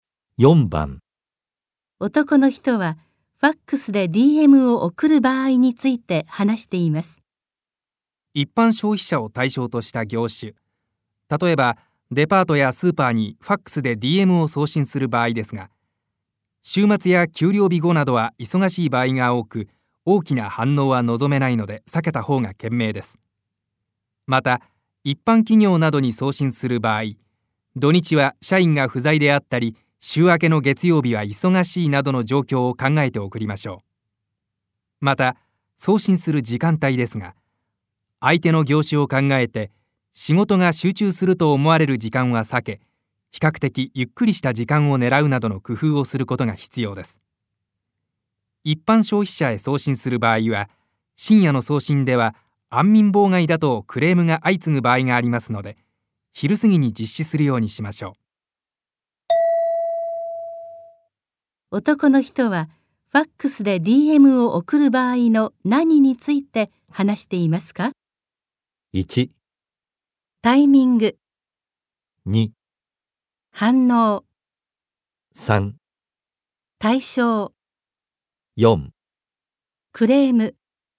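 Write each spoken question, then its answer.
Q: 男の人はファックスで DM を送る場合の何について話していますか?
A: 1: タイミング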